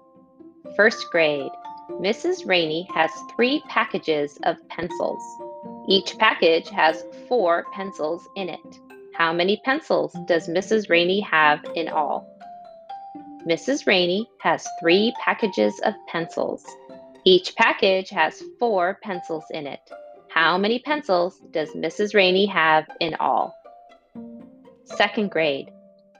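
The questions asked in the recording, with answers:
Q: How many pencils does Mrs. Rainey have in all?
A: 12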